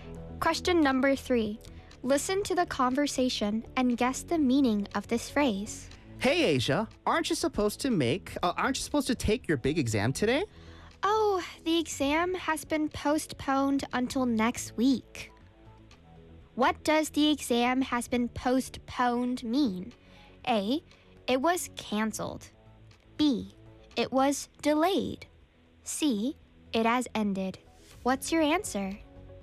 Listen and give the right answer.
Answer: It was delayed.